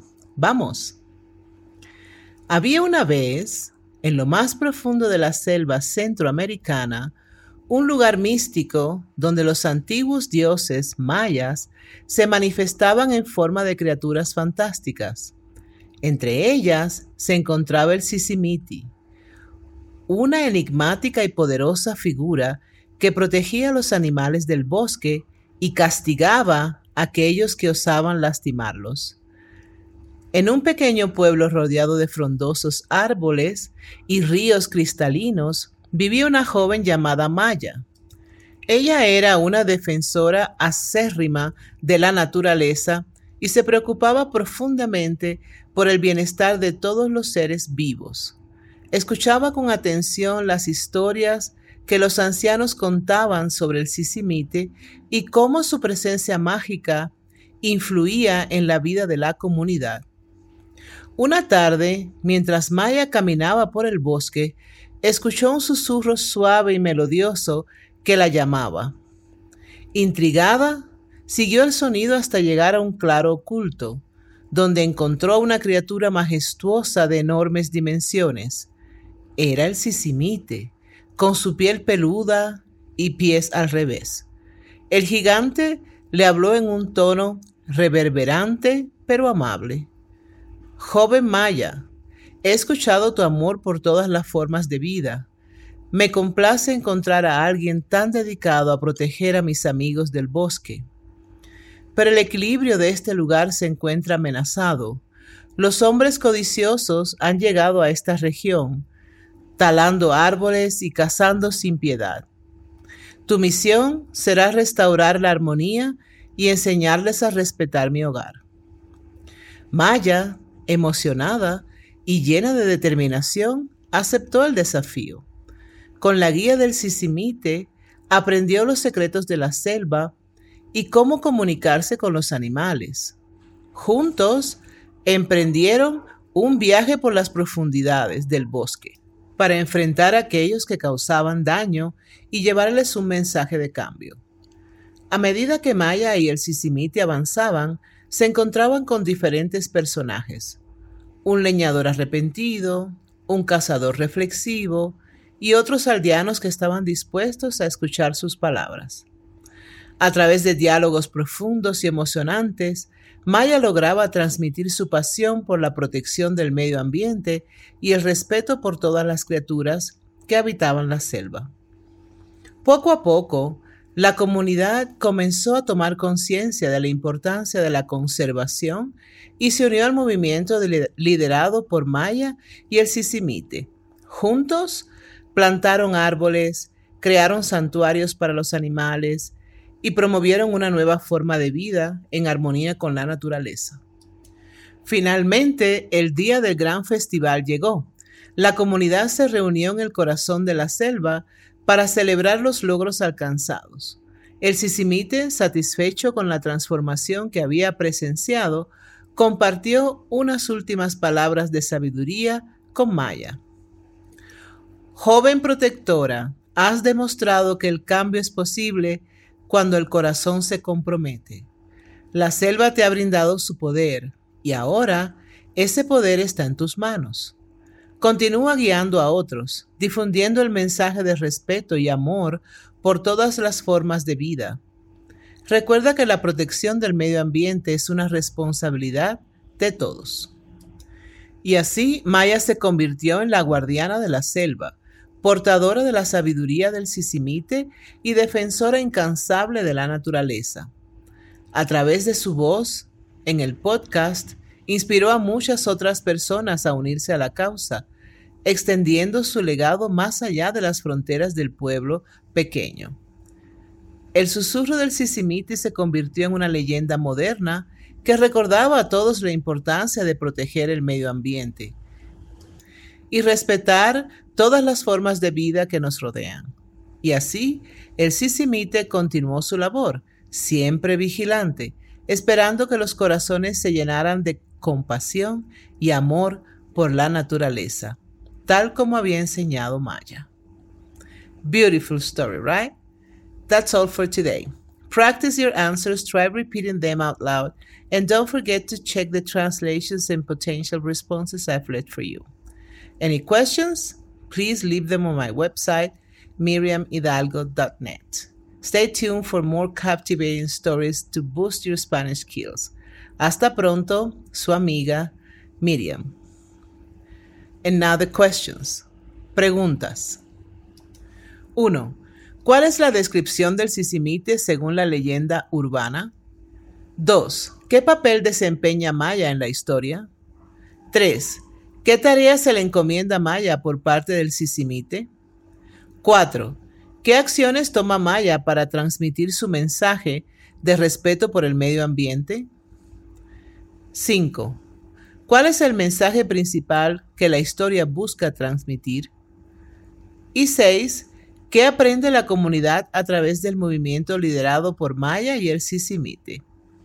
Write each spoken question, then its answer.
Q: ¿Cuál es la descripción del sisimite según la leyenda urbana?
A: El sisimite es un gigante peludo con pies al revés.

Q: ¿Qué papel desempeña Maya en la historia?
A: Maya es una joven defensora de la naturaleza.

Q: ¿Qué tarea se le encomienda a Maya por parte del sisimite?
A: Maya debe restaurar la armonía de la selva y enseñar a respetar el medio ambiente.

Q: ¿Qué acciones toma Maya para transmitir su mensaje de respeto por el medio ambiente?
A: Maya planta árboles, crea santuarios para los animales y habla sobre la importancia de la conservación.

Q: ¿Cuál es el mensaje principal que la historia busca transmitir?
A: El mensaje principal de la historia es proteger el medio ambiente y respetar todas las formas de vida.

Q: ¿Qué aprende la comunidad a través del movimiento liderado por Maya y el Sisimite?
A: La comunidad aprende de la importancia de la conservación y se une para proteger la naturaleza.